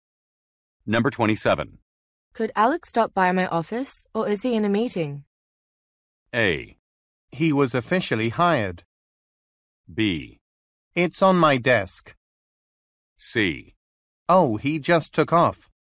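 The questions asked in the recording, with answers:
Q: Could Alex stop by my office, or is he in a meeting?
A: C: Oh, he just took off.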